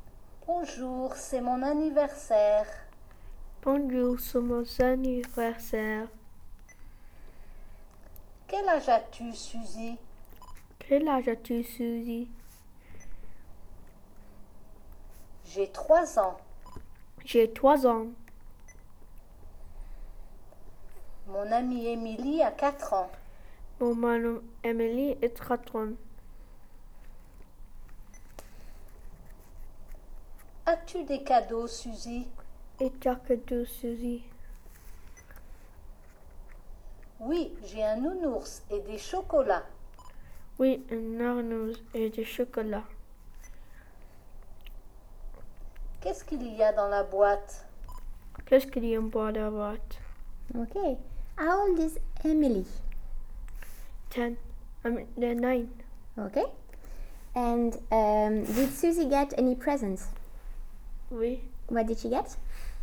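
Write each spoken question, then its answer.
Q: And did Susie get any presents?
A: Oui.

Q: What did she get?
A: A teddy bear and chocolates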